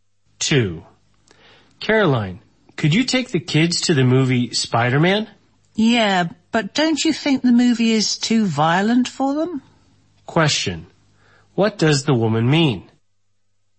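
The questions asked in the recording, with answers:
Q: What does the woman mean?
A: The movie may be too violent for the kids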